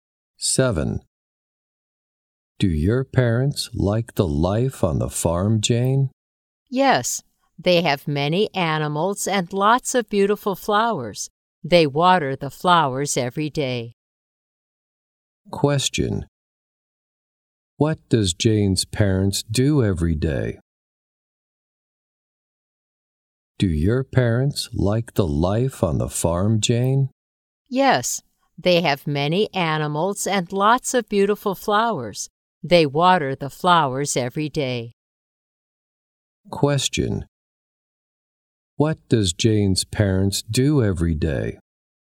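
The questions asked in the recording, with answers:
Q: What does Jane's parents do every day?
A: They water the flowers.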